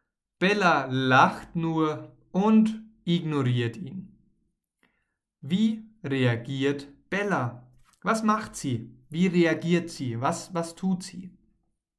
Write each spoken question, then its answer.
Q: Wie reagiert Bella, was macht sie?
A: Bella lacht und ignoriert ihn.